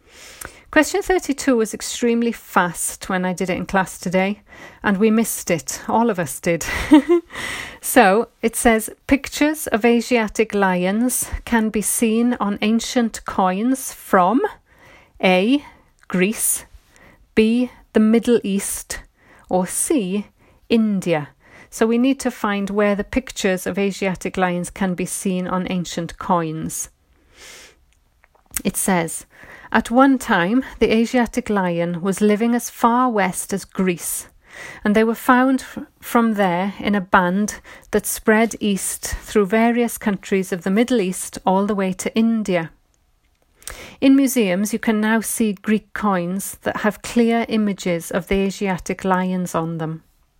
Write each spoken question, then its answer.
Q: Pictures of Asiatic lions can be seen on ancient coins from A.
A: And the answer is A, Greece.